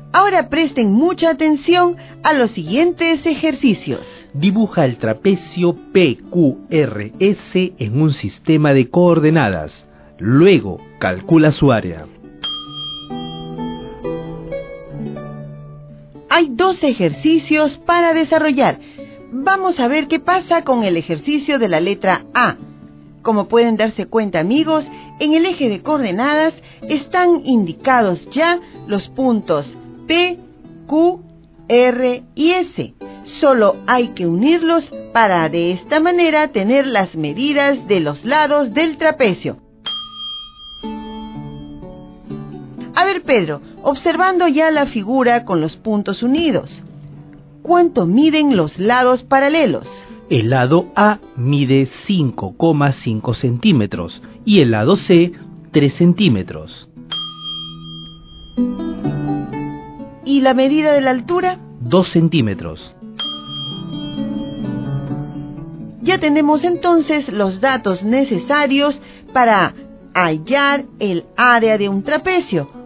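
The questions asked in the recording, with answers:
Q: Luego, calcula su área.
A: 8,5 cm2 (1/2 × (5,5 + 3) × 2)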